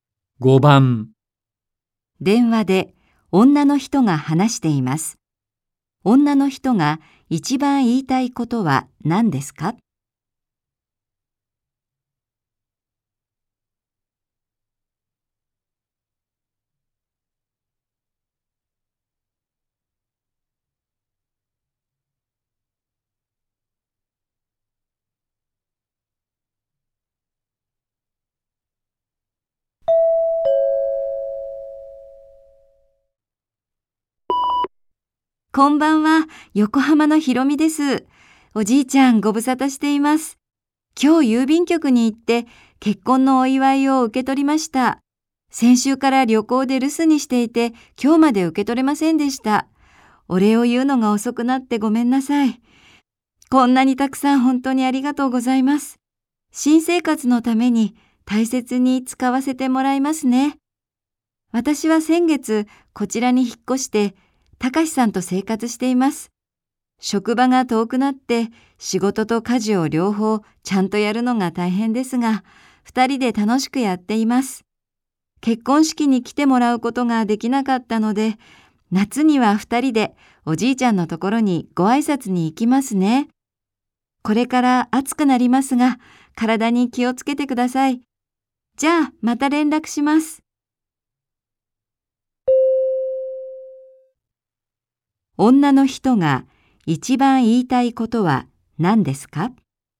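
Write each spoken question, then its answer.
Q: 女の人が一番言いたいことは何ですか?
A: 結婚のお祝いをもらったお礼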